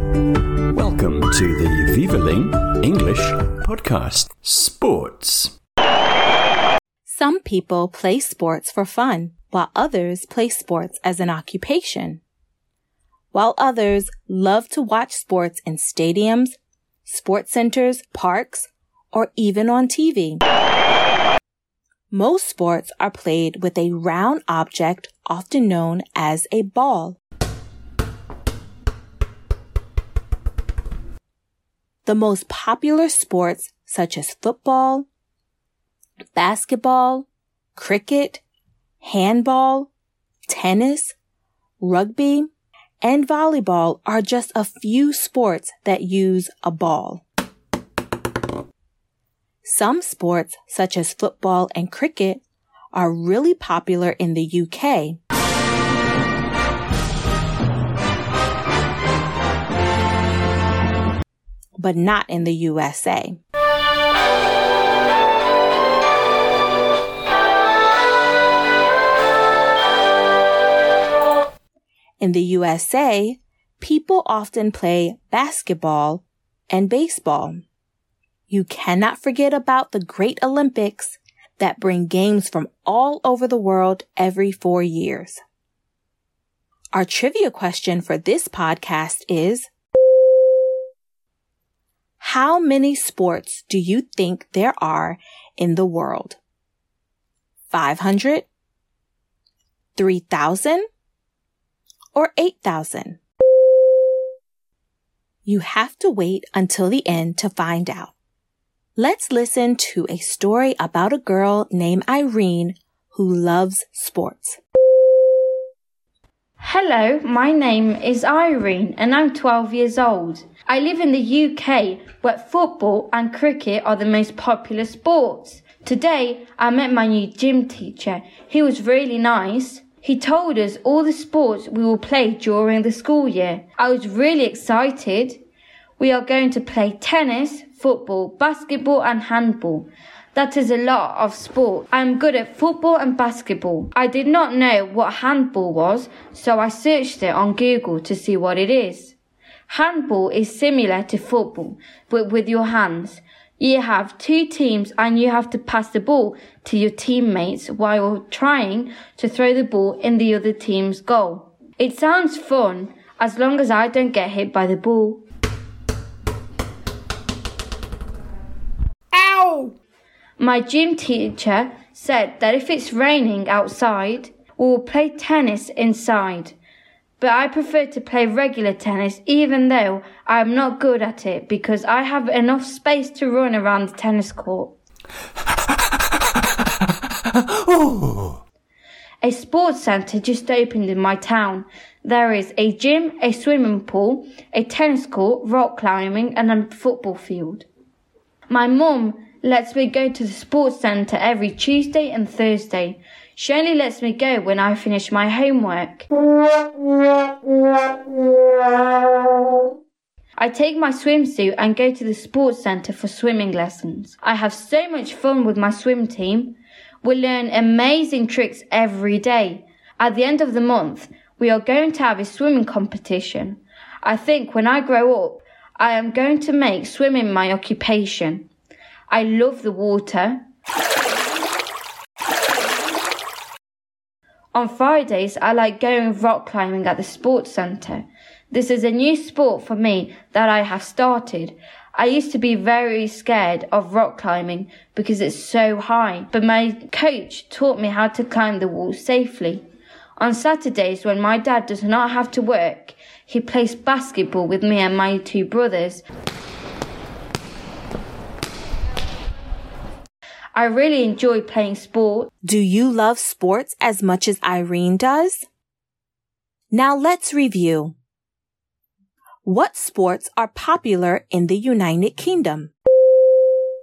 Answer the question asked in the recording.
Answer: The answer is football and cricket.